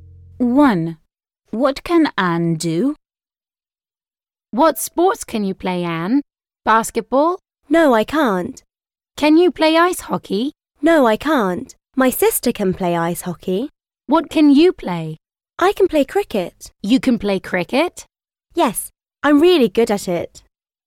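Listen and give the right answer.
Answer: play cricket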